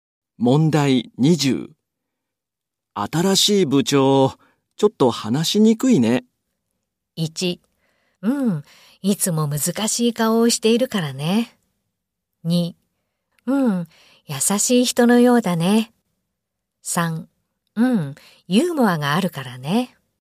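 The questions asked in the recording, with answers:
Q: 新しい部長、ちょっと話しにくいね。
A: 2: うん、いつも難しい顔をしているからね。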